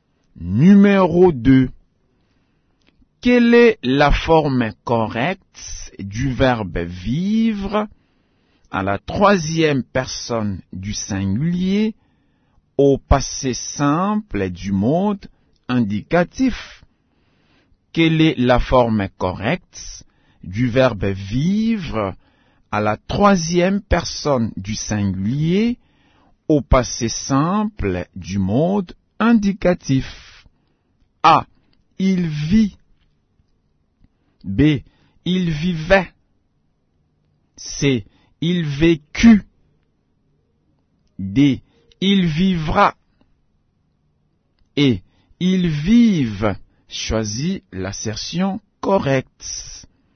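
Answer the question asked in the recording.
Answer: C: il vécut.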